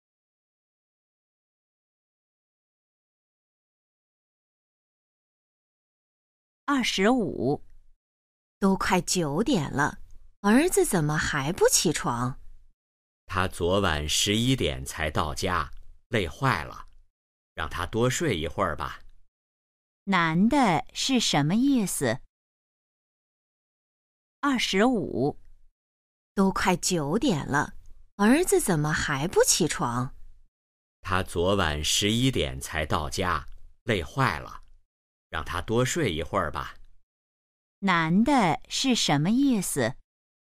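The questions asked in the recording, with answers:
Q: 男的是什么意思?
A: 让儿子多睡一会儿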